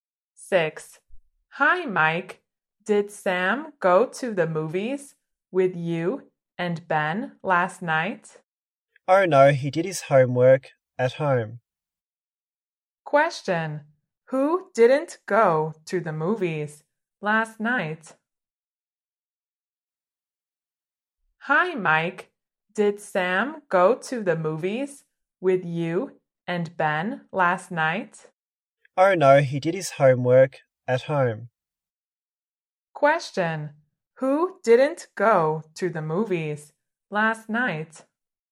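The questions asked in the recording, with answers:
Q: Who didn't go to the movies last night?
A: Sam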